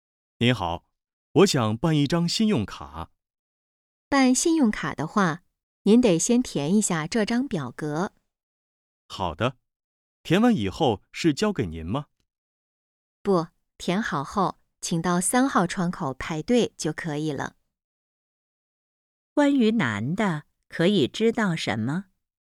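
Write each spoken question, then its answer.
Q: 关于男的,可以知道什么?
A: 他想办一张信用卡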